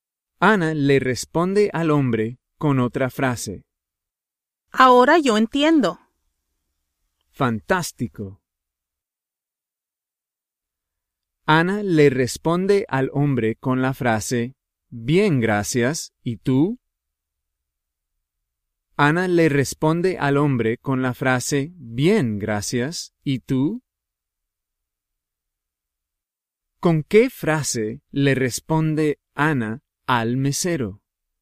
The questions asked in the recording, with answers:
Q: ¿Con qué frase le responde Ana al mesero?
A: Afortunadamente, Ana le responde al hombre con la frase, bien, gracias, ¿y tú?